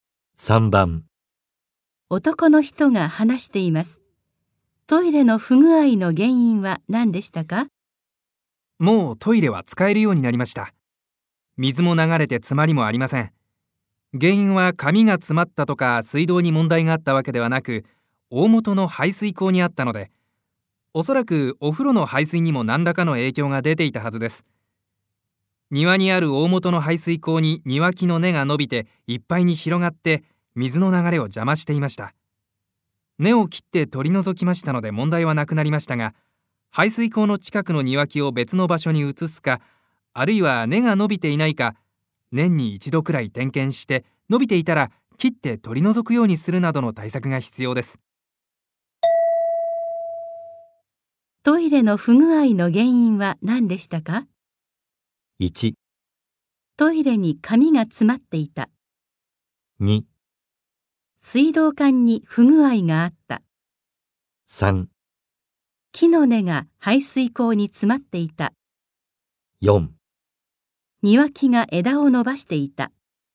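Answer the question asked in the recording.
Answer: 3: 木の根が排水口に詰まっていた。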